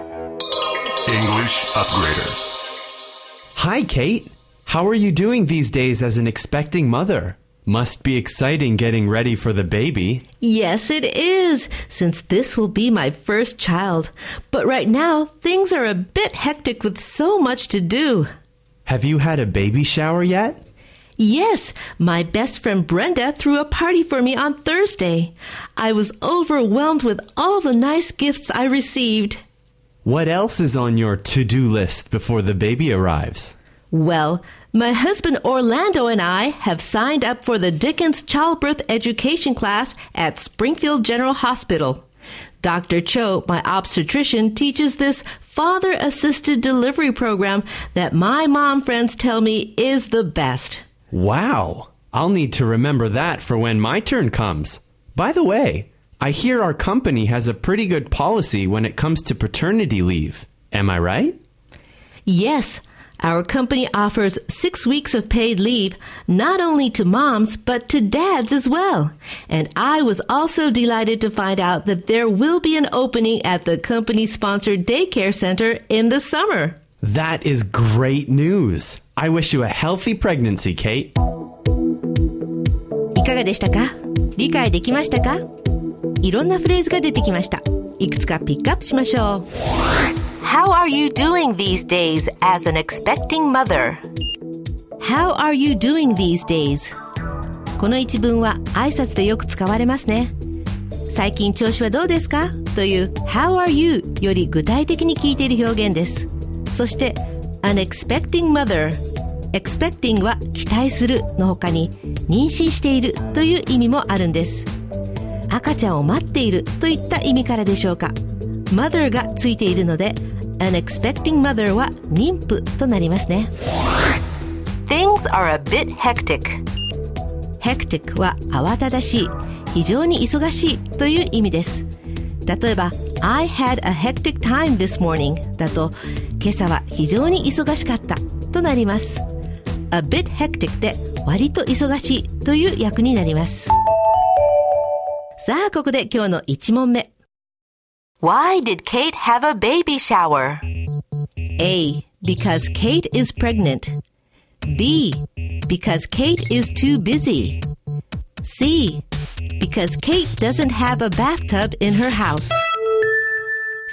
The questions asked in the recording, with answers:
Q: Why did Kate have a baby shower?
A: 正解は A